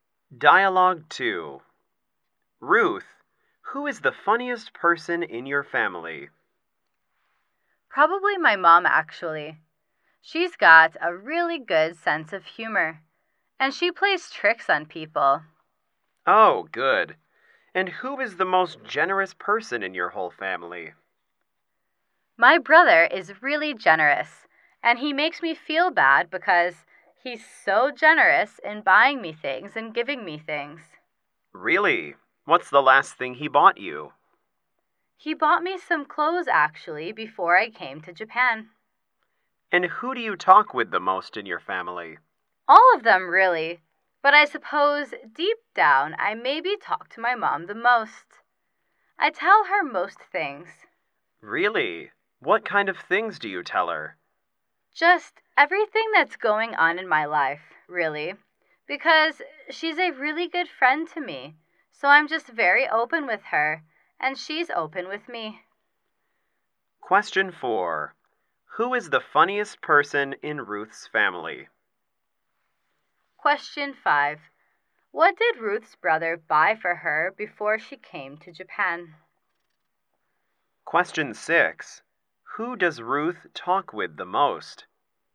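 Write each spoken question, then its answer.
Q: Who is the funniest person in Ruth's family?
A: Her mom

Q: What did Ruth's brother buy for her before she came to Japan?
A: Some clothes

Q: Who does Ruth talk with the most?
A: Her mom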